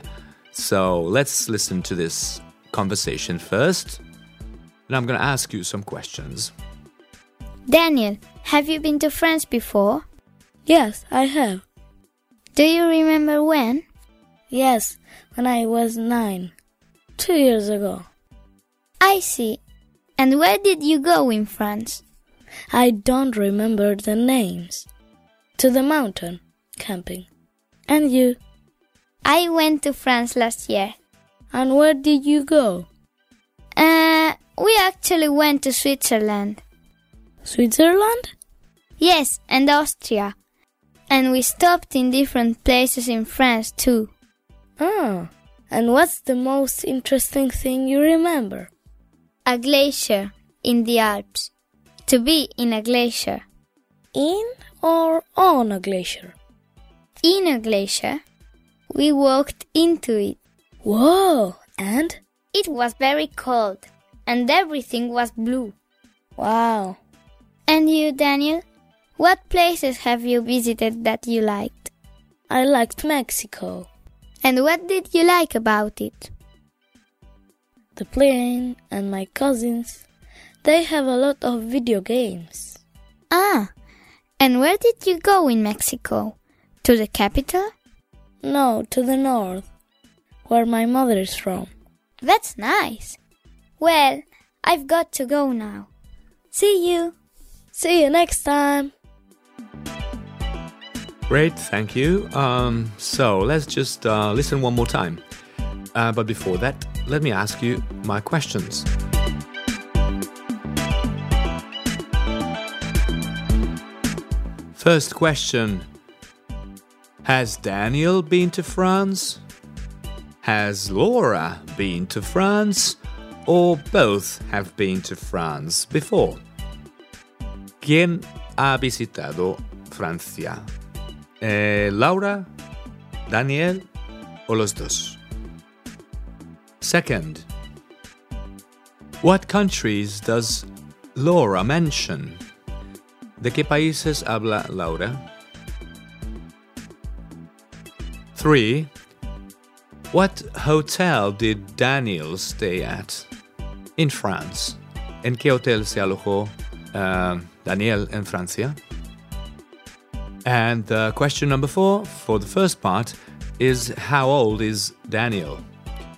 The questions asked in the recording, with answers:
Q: First question. Has Daniel been to France?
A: And the answer is both, okay?

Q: Second, what countries does Laura mention?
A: Well, she mentions France, Switzerland, and Austria.

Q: Three, what hotel did Daniel stay at in France?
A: In no hotel at all. So Daniel did not stay in a hotel.

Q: And question number four, for the first part, is how old is Daniel?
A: He's 11.